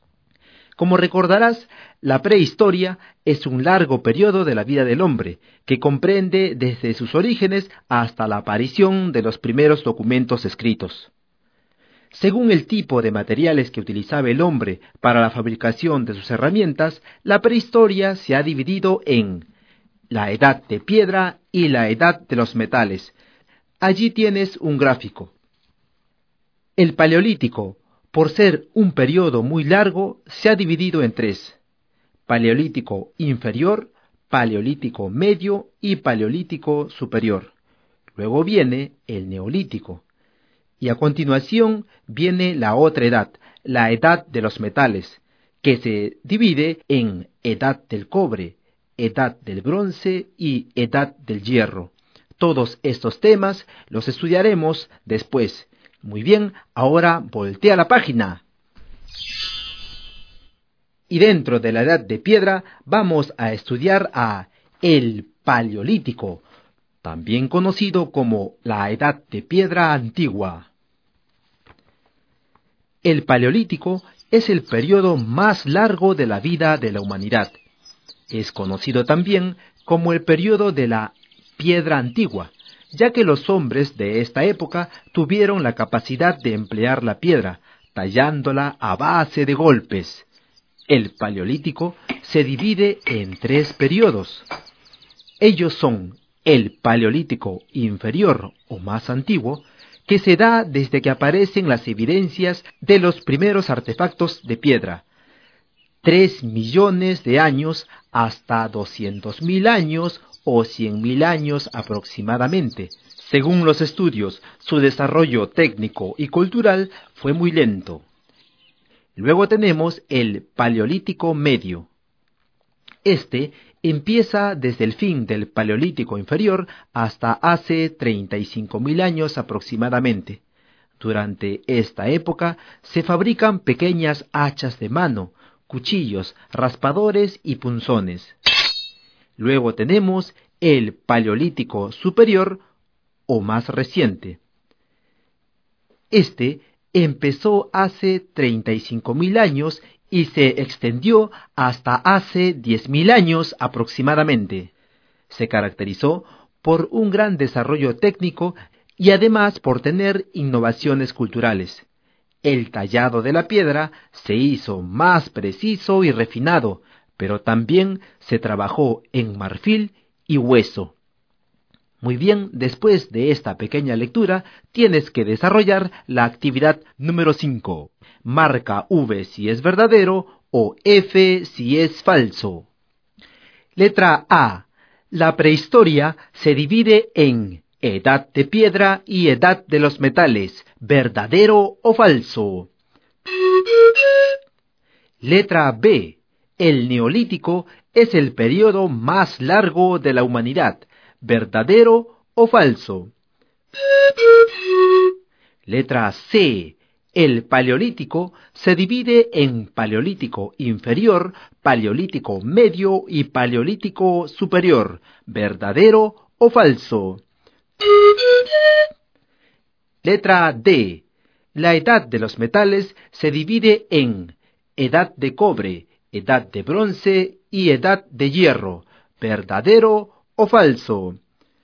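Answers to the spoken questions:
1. Verdadero
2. Falso
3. Verdadero
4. Verdadero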